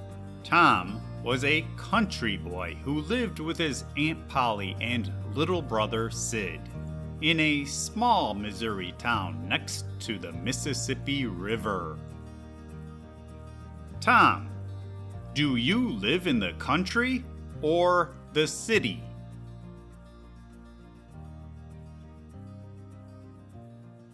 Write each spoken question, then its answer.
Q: Tom, do you live in the country or the city?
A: I live in the country with my Aunt Polly and little brother Sid.